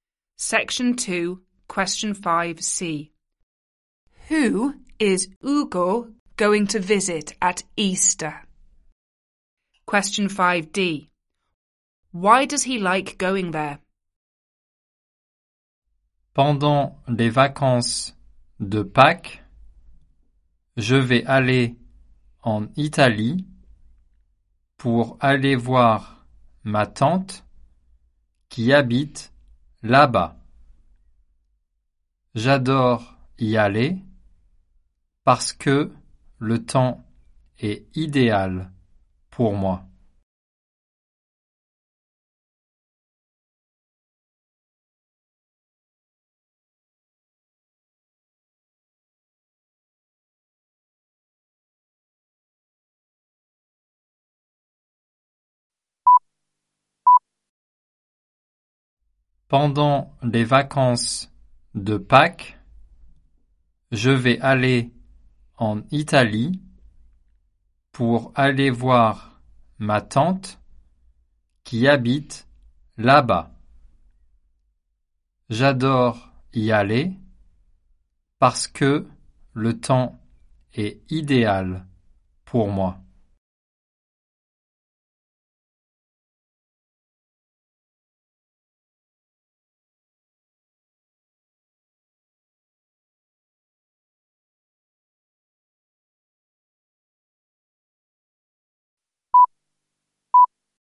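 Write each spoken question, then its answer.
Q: Who is Ugo going to visit at Easter?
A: His aunt (in Italy)

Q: Why does he like going there?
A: The weather is ideal for him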